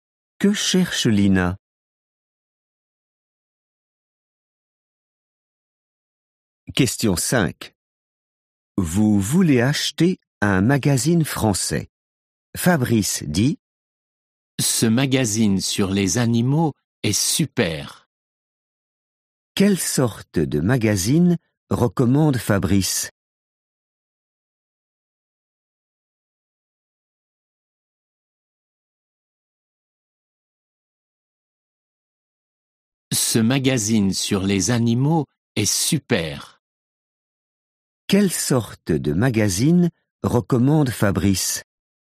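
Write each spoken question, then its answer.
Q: Quelle sorte de magazine recommande Fabrice?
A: un magazine sur les animaux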